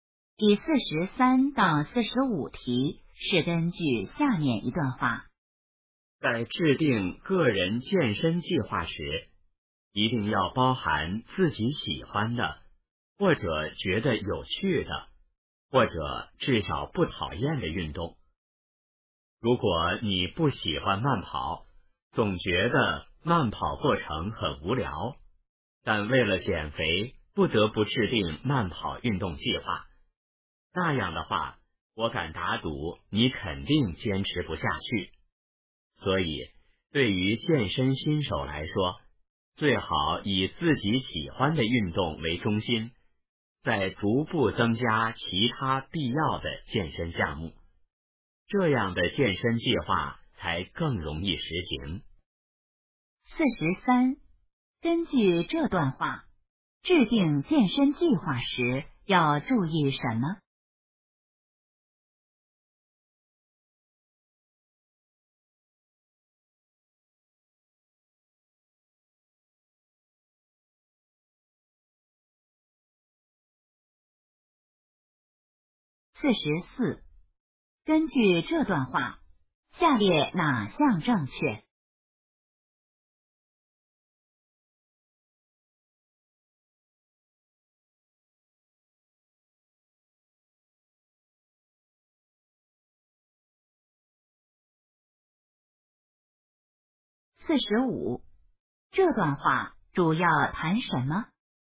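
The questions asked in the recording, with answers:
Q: 根据这段话,制定健身计划时要注意什么?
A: 要包含自己喜欢、觉得有趣或至少不讨厌的运动

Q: 这段话主要谈什么?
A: 如何制定个人健身计划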